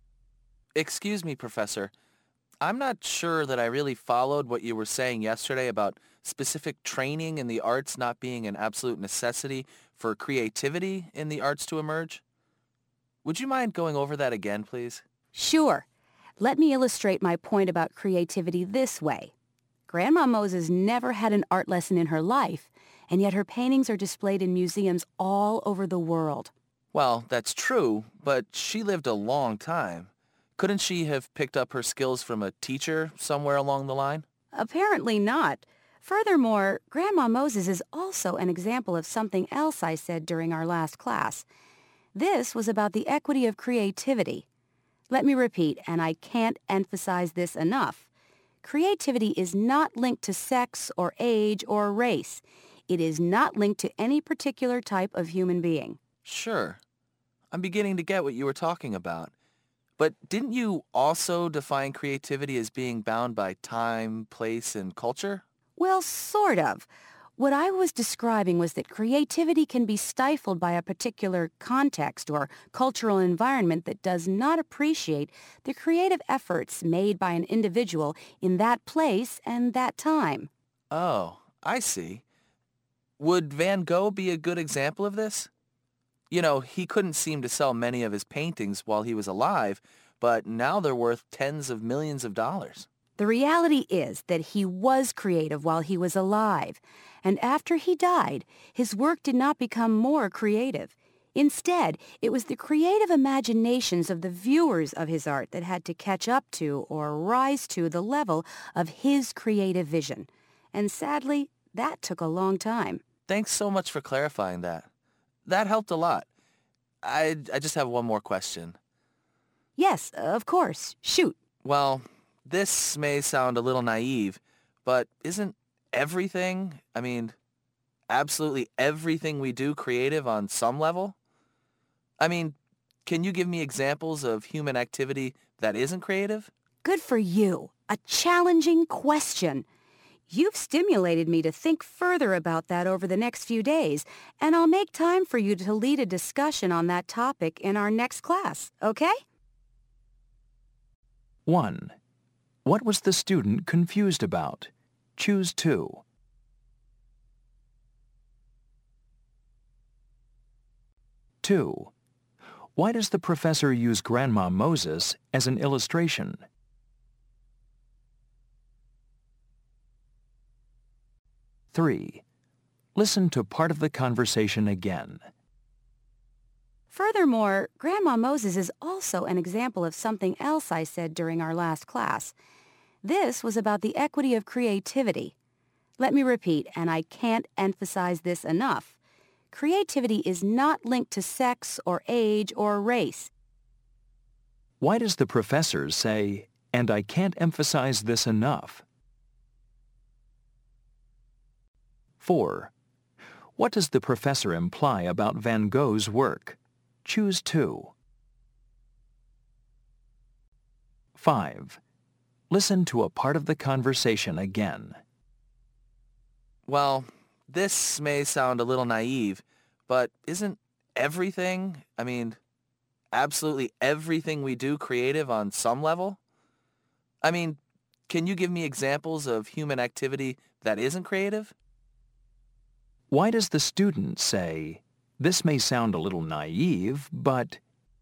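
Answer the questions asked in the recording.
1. Whether specific training in the arts is necessary for creativity in the arts
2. To show that creativity can emerge without art training and is not linked to age or sex
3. To stress that this point is very important: creativity is not linked to sex, age or race
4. To soften a question the student fears may seem too simple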